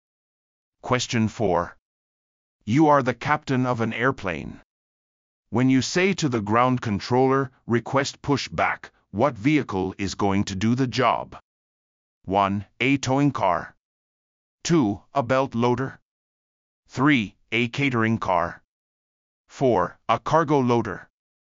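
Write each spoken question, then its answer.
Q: When you say to the ground controller, "Request push back," what vehicle is going to do the job?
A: 1: A towing car.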